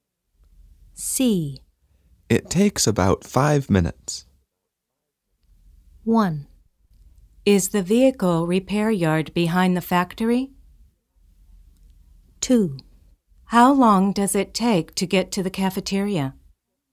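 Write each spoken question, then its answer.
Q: It takes about 5 minutes.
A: 2: How long does it take to get to the cafeteria?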